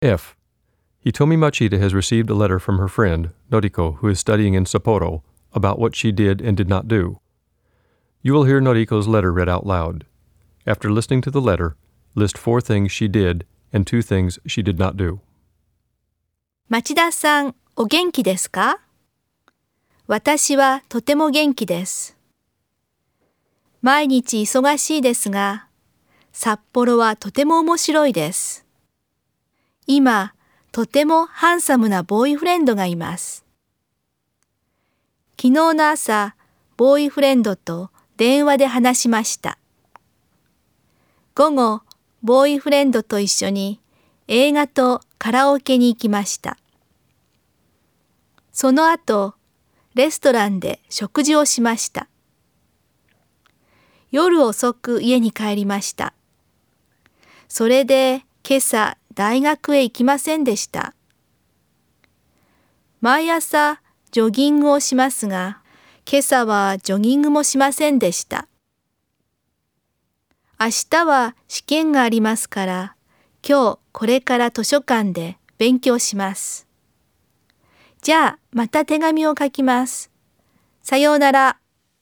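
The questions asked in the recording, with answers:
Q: After listening to the letter, list 4 things she did and 2 things she did not do.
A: Did: talked with her boyfriend on the phone, went to a movie, went to karaoke, ate at a restaurant (and came home late). Did not: go to university this morning, go jogging this morning.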